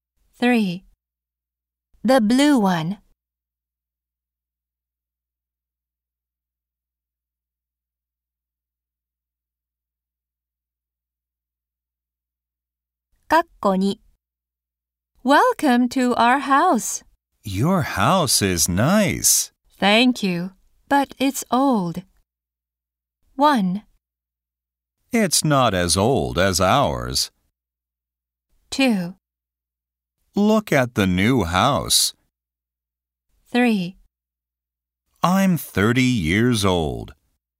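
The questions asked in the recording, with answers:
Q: Thank you, but it's old.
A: 1: It's not as old as ours.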